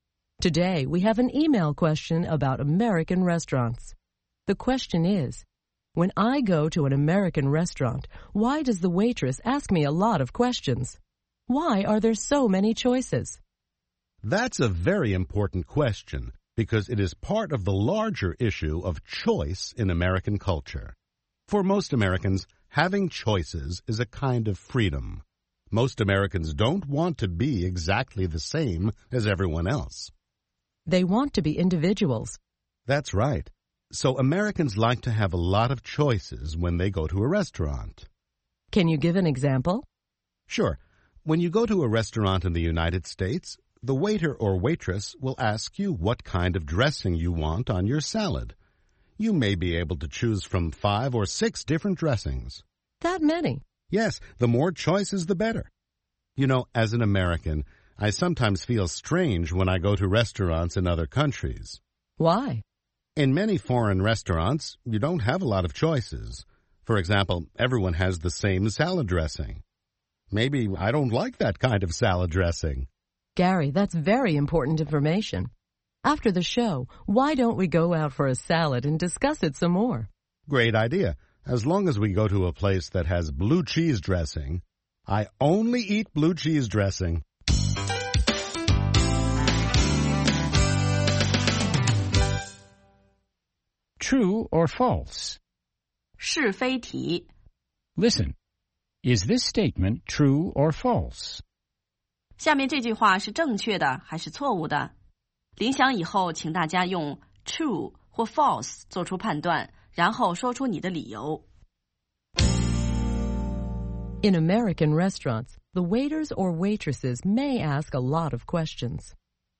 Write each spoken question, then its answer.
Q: In American restaurants, the waiters or waitresses may ask a lot of questions.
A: True.For example, they may ask what kind of salad dressing you want.